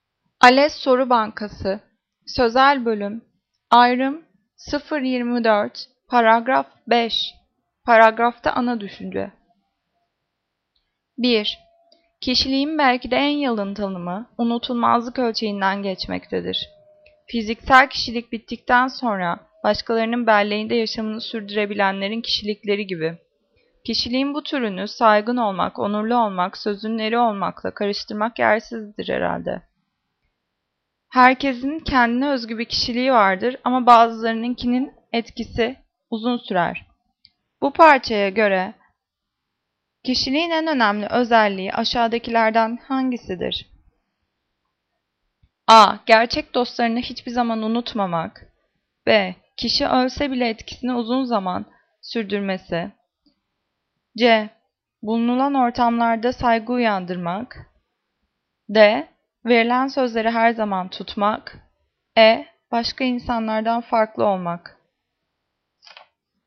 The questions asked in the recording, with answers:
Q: Bu parçaya göre kişiliğin en önemli özelliği aşağıdakilerden hangisidir?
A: Cevap B. Kişi ölse bile etkisini uzun bir zaman sürdürmesi.